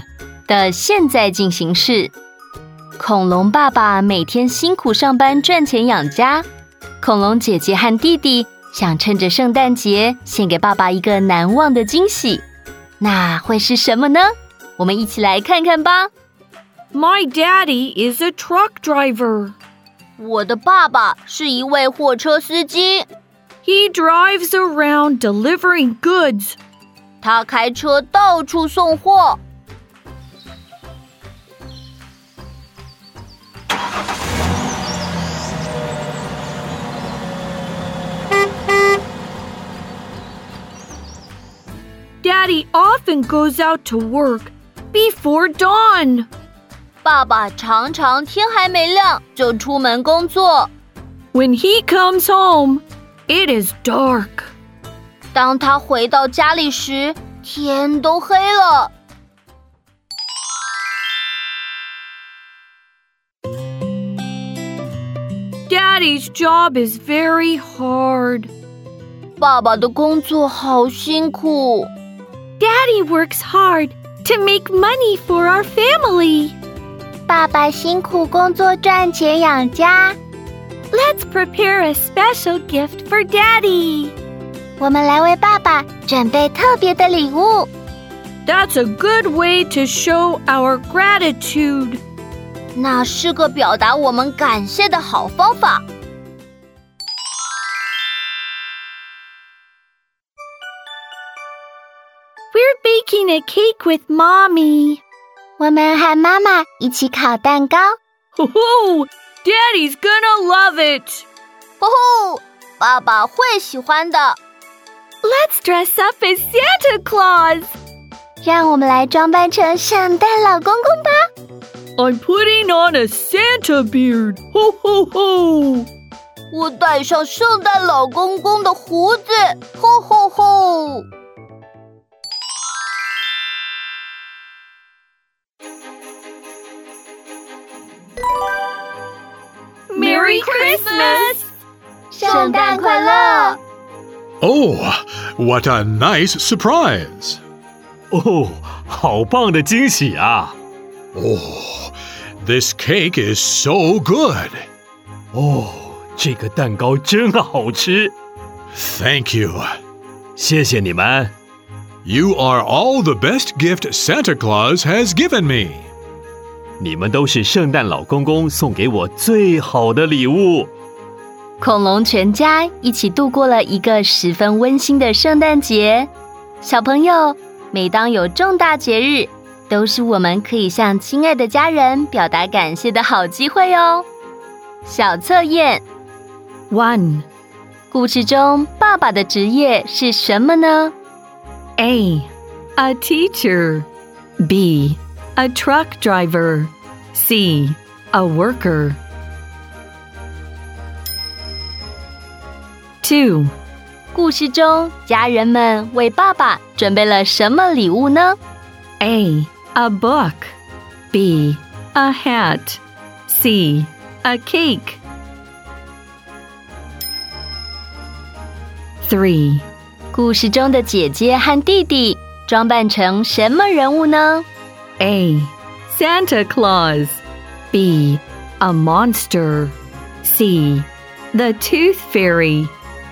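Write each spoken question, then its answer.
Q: 故事中爸爸的职业是什么呢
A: B: A truck driver

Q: 故事中家人们为爸爸准备了什么礼物呢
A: C: A cake

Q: 故事中的姐姐和弟弟装扮成什么人物呢?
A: A: Santa Claus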